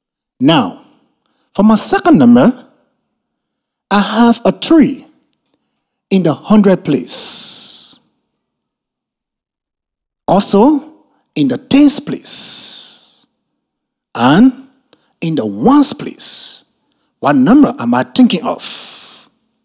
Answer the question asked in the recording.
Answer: 333.